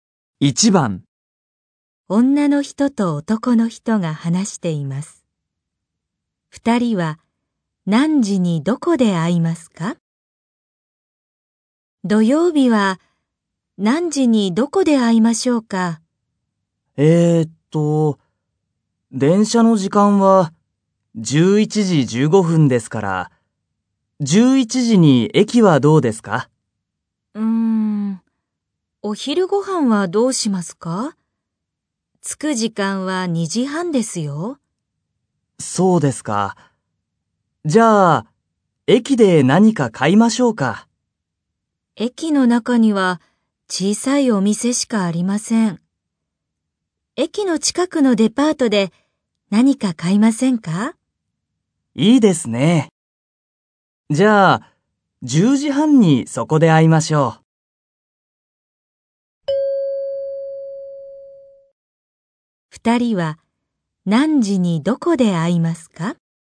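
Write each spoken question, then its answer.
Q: 二人は何時にどこで会いますか?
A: 10時半に駅の近くのデパートで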